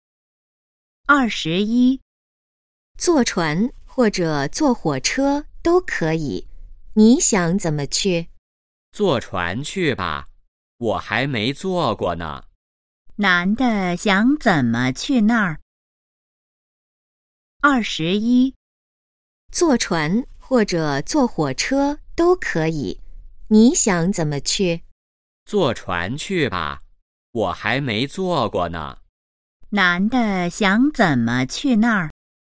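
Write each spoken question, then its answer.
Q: 男的想怎么去那儿?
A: 坐船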